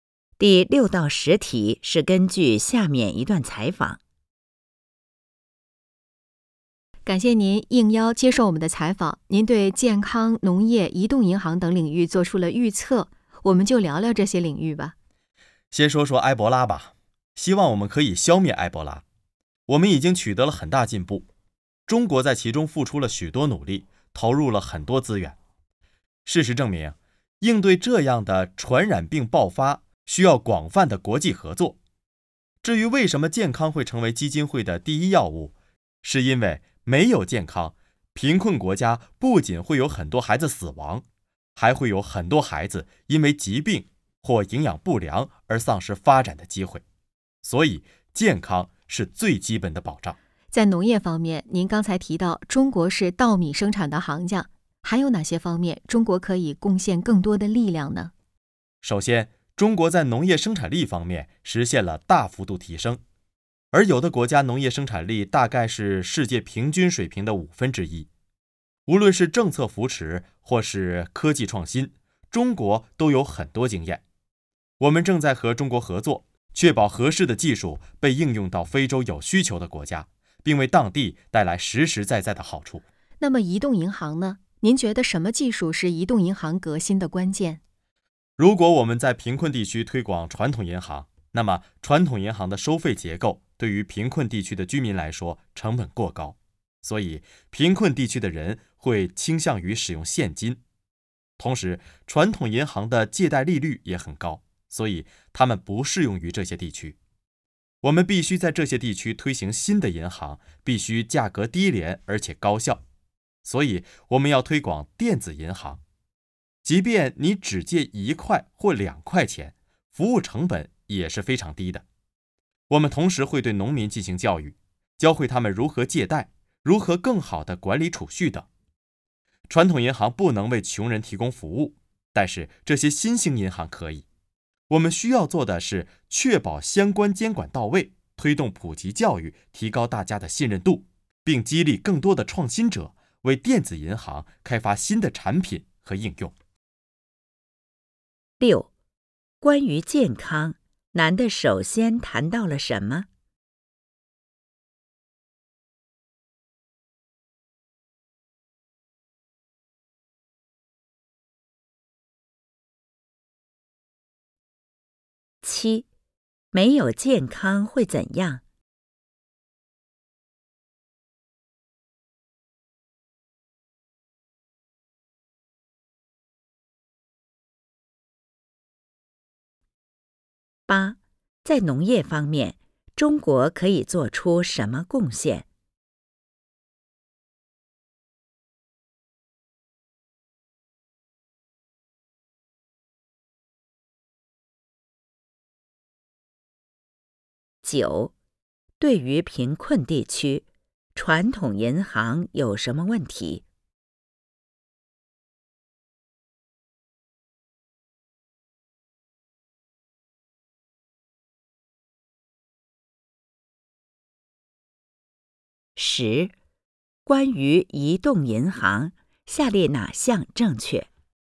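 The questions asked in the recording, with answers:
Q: 关于健康,男的首先谈到了什么?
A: 埃博拉

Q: 没有健康会怎样?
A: 贫困国家很多孩子会死亡,还有很多孩子因疾病或营养不良丧失发展机会

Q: 在农业方面,中国可以做出什么贡献?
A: 分享政策扶持和科技创新经验,把合适的技术应用到非洲有需求的国家

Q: 对于贫困地区,传统银行有什么问题?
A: 收费成本过高,借贷利率也很高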